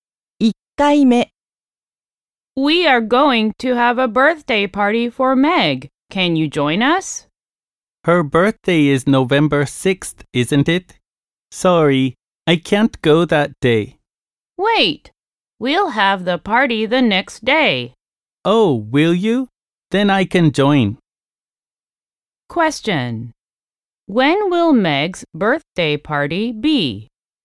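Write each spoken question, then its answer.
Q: When will Meg's birthday party be?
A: November 7th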